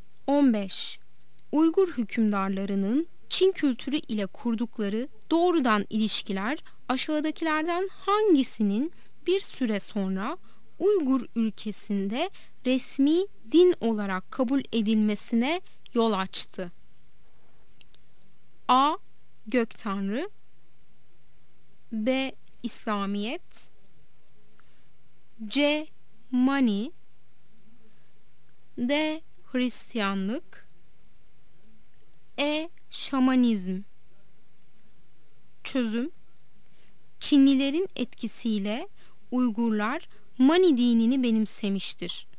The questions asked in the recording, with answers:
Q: Uygur hükümdarlarının Çin kültürü ile kurdukları doğrudan ilişkiler aşağıdakilerden hangisinin bir süre sonra Uygur ülkesinde resmi din olarak kabul edilmesine yol açtı?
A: Yanıt C'dir. Mani.